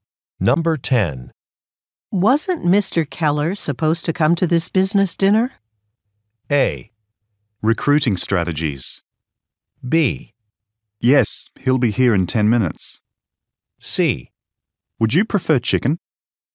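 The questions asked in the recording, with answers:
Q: Wasn't Mr. Keller supposed to come to this business dinner?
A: B: Yes, he'll be here in 10 minutes.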